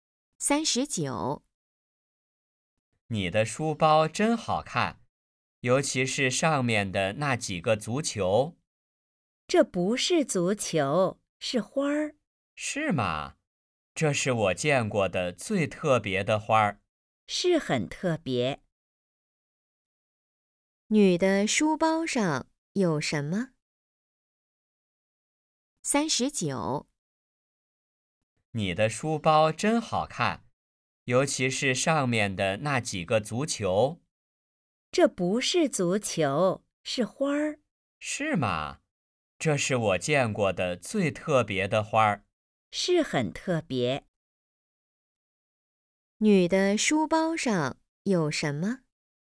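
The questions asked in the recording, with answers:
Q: 女的书包上有什么?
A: 花儿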